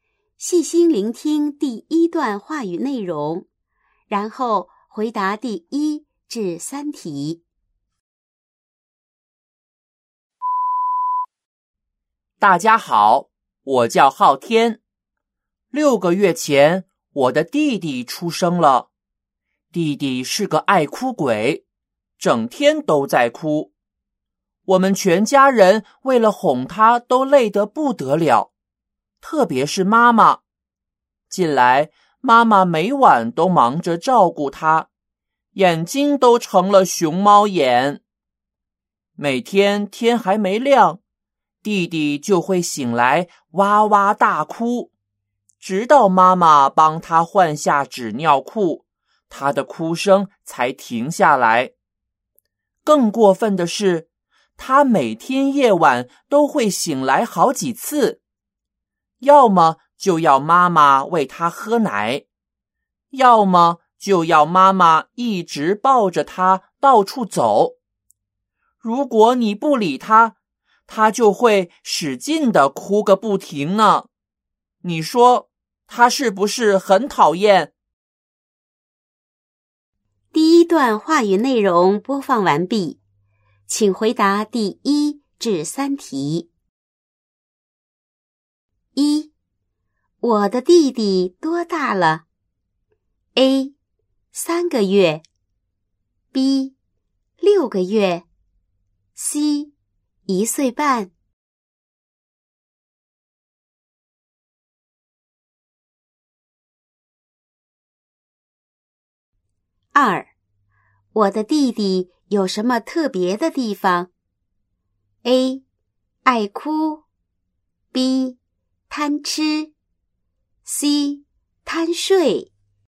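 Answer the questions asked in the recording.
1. B: 六个月
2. A: 爱哭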